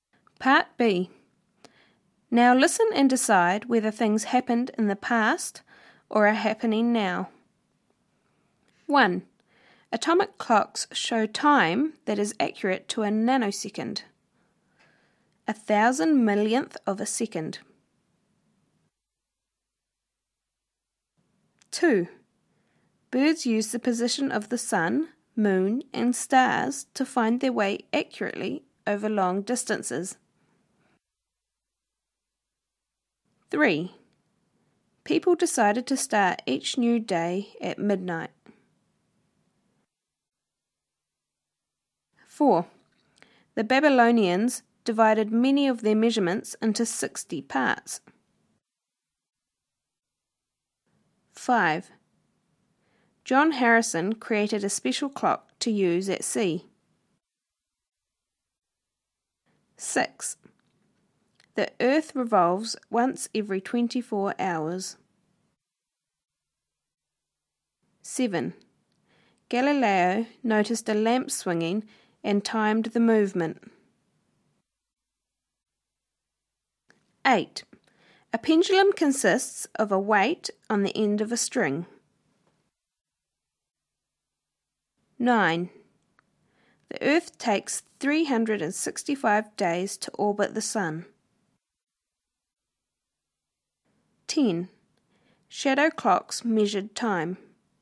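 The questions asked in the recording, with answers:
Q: Atomic clocks show time that is accurate to a nanosecond.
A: now

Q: Birds use the position of the sun, moon, and stars to find their way accurately over long distances.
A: now

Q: People decided to start each new day at midnight.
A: past

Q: The Babylonians divided many of their measurements into 60 parts.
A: past

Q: John Harrison created a special clock to use at sea.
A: past

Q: The Earth revolves once every 24 hours.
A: now

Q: Galileo noticed a lamp swinging and timed the movement.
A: past

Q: A pendulum consists of a weight on the end of a string.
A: now

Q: The Earth takes 365 days to orbit the Sun.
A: now

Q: Shadow clocks measured time.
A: past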